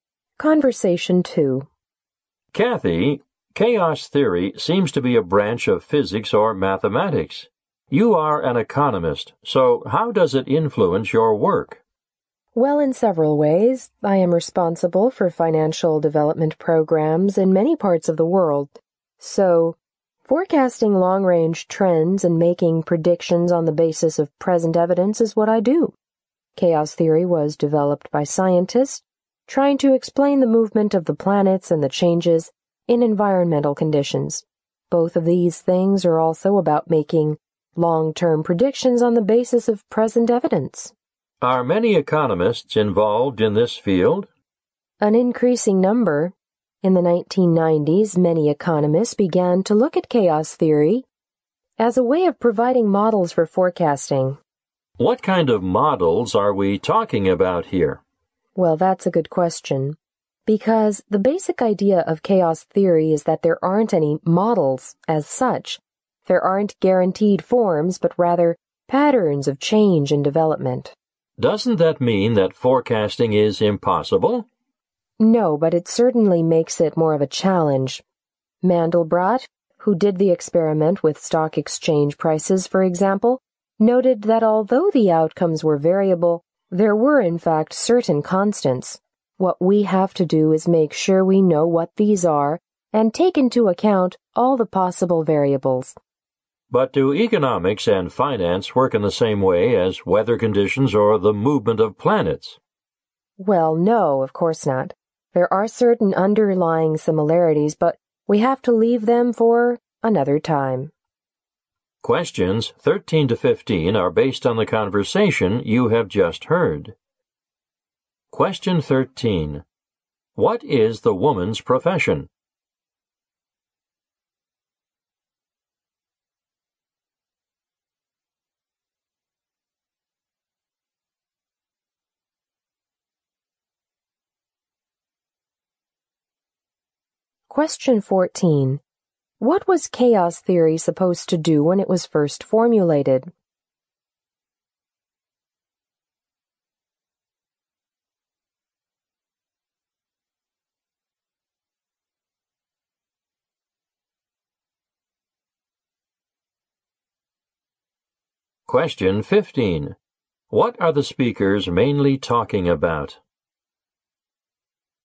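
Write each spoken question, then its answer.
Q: What is the woman's profession?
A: She is an economist.

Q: What was chaos theory supposed to do when it was first formulated?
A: Explain the movement of the planets and changes in environmental conditions.

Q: What are the speakers mainly talking about?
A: How chaos theory is applied to economic forecasting.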